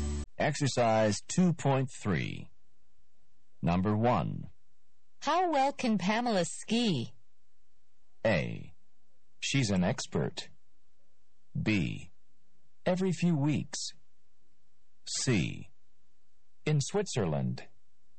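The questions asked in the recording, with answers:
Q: How well can Pamela ski?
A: A: She's an expert.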